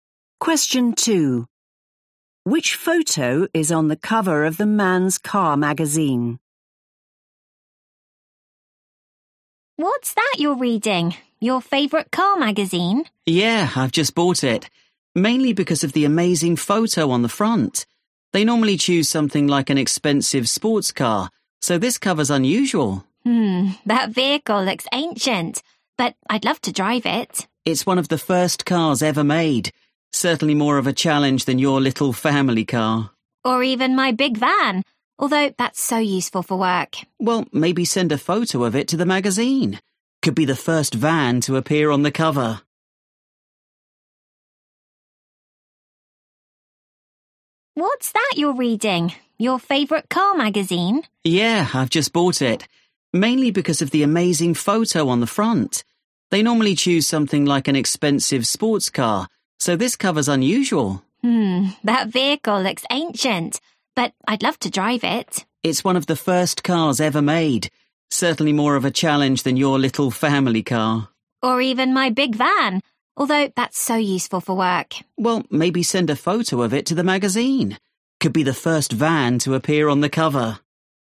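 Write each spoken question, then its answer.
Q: Which photo is on the cover of the Man's Car magazine?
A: a very old car, one of the first cars ever made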